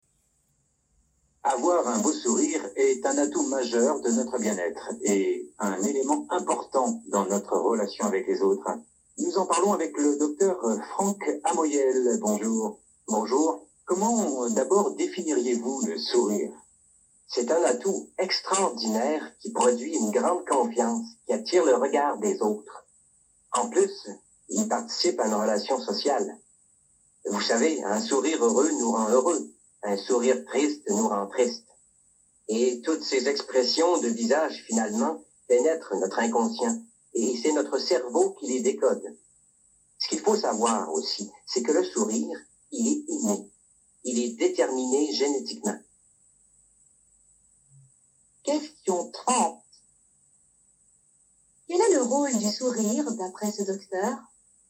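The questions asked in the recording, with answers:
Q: Quel est le rôle du sourire, d'après ce docteur ?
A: Il donne confiance, attire le regard des autres et participe à la relation sociale.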